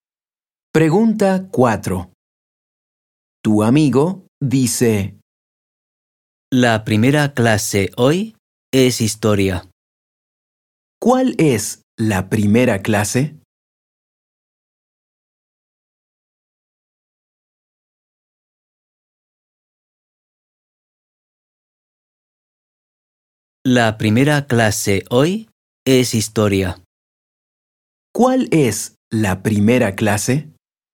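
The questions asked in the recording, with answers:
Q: ¿Cuál es la primera clase?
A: Historia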